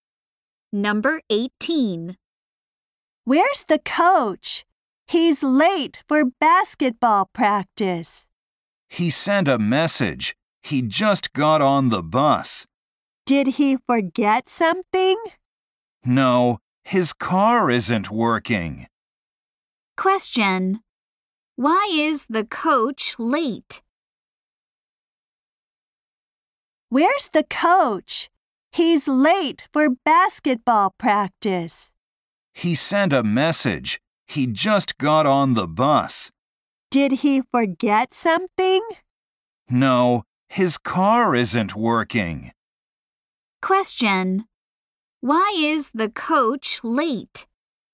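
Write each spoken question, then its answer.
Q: Why is the coach late?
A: His car isn't working.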